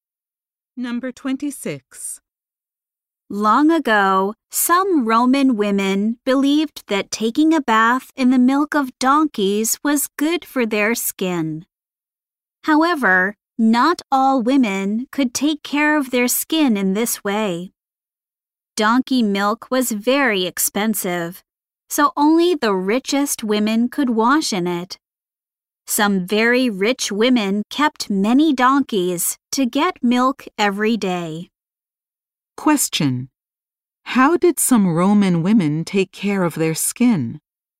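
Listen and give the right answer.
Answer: By bathing in donkey milk.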